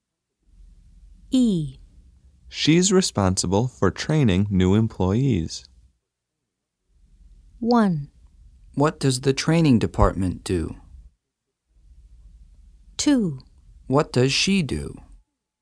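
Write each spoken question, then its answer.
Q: She's responsible for training new employees.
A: 2: What does she do?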